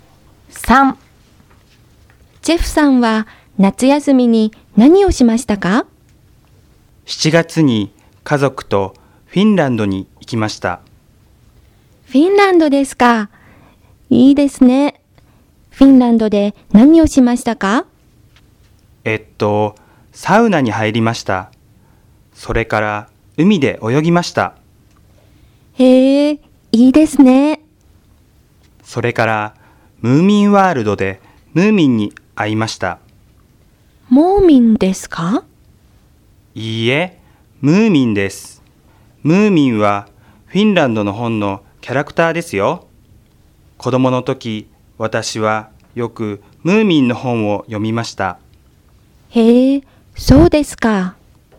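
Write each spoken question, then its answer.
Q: ジェフさんは夏休みに何をしましたか?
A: 家族とフィンランドに行って、サウナに入り、海で泳ぎ、ムーミンワールドでムーミンに会いました。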